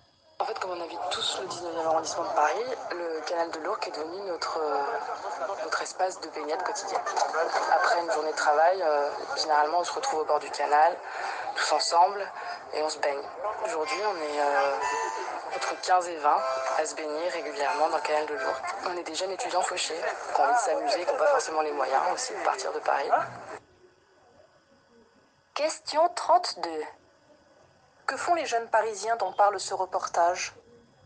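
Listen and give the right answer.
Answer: Ils se baignent ensemble dans le canal de l'Ourcq après le travail.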